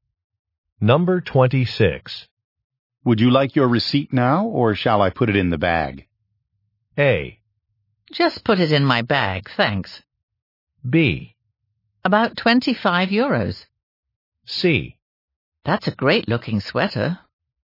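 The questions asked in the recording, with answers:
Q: Would you like your receipt now, or shall I put it in the bag?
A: A: Just put it in my bag, thanks.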